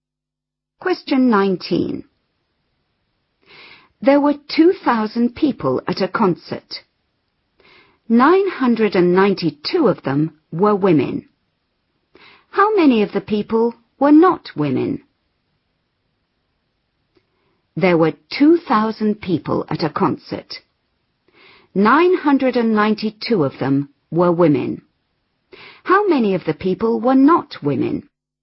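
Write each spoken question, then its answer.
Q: How many of the people were not women?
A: 1008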